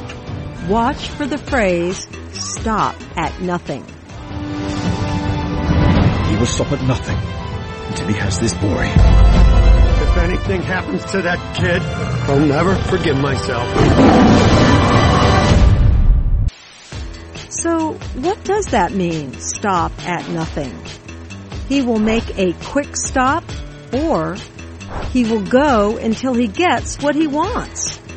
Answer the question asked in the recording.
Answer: Stop at nothing means he will go until he gets what he wants.